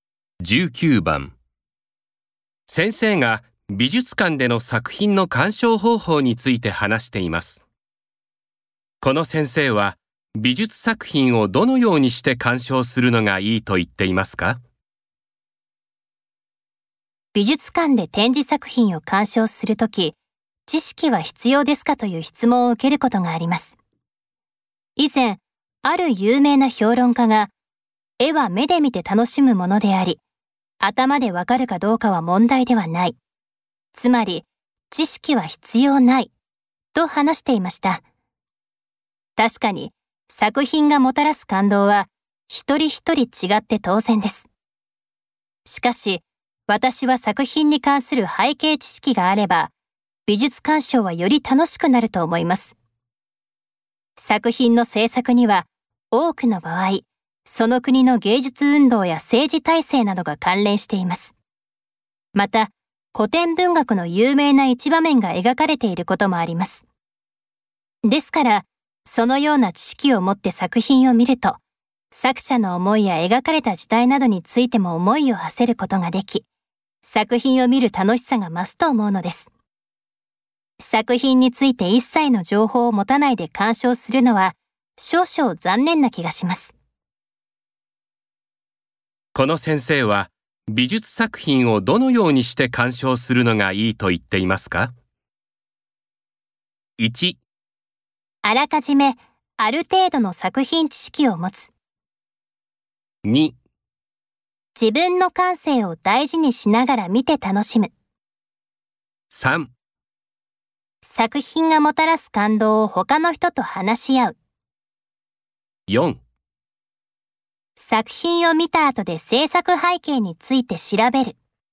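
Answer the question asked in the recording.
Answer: 1: あらかじめある程度の作品知識を持つ。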